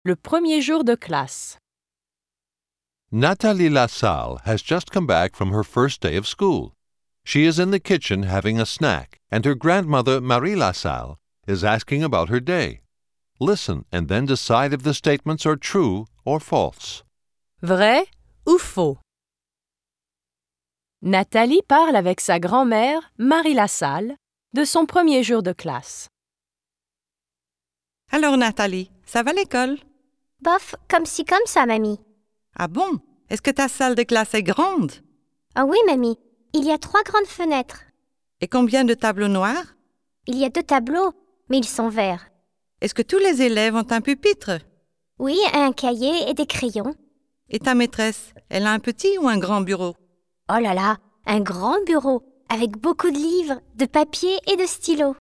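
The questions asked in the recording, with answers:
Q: Vrai ou faux? Nathalie parle avec sa grand-mère, Marie Lassalle, de son premier jour de classe.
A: Vrai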